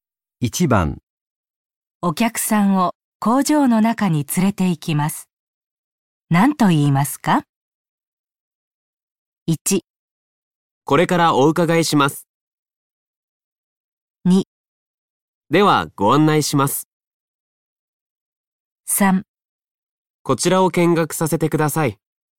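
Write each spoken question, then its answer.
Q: お客さんを工場の中に連れて行きます。何と言いますか?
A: 2: ではご案内します。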